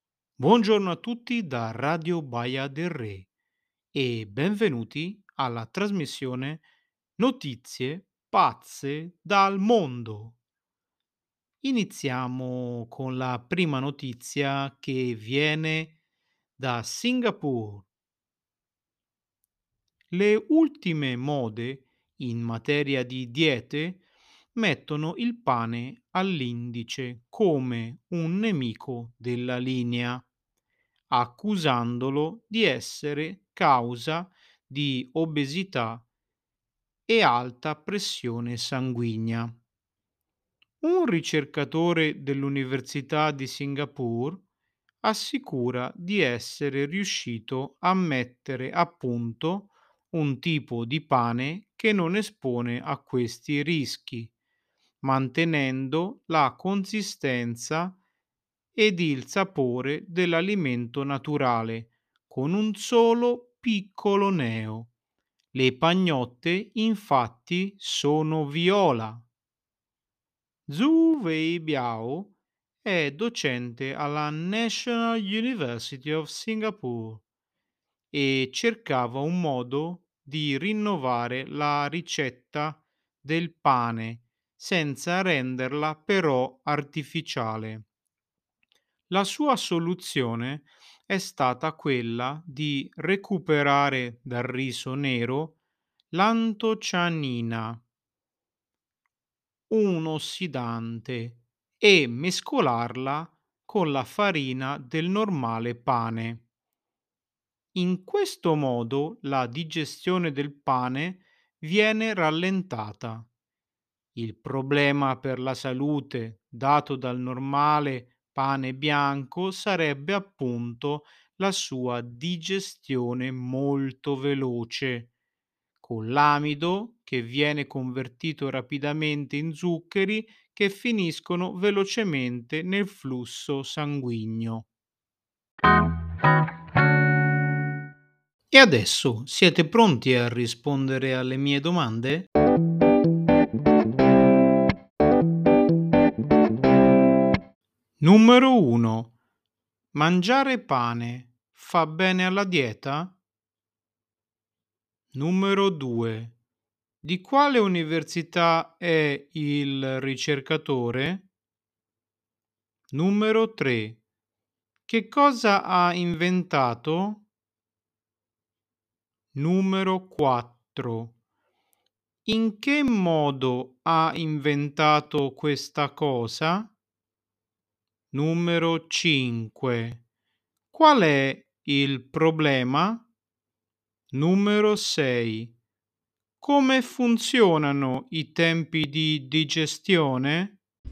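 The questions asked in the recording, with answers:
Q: Mangiare pane fa bene alla dieta?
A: No, secondo le ultime mode è accusato di causare obesità e alta pressione

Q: Di quale università è il ricercatore?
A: National University of Singapore

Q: Che cosa ha inventato?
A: Un pane viola che non causa obesità e alta pressione

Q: In che modo ha inventato questa cosa?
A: Mescolando l'antocianina del riso nero con la farina

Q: Come funzionano i tempi di digestione?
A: Il pane bianco si digerisce velocemente, quello nuovo più lentamente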